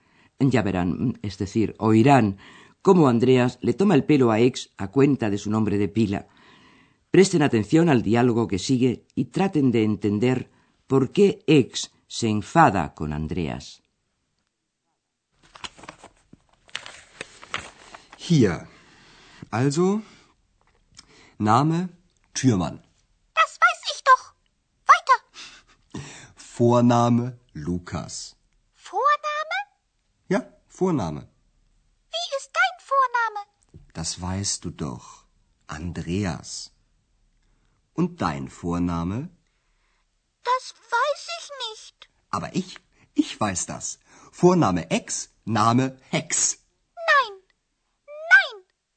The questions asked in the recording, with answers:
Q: traten de entender por qué X se enfada con Andreas.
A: Ex se enfada con Andreas porque éste le inventa un apellido que rima con su nombre, el que ya conocemos, Ex, y el apellido Hex, que viene a ser la abreviatura de Hexe, bruja, y eso no le gusta a Ex.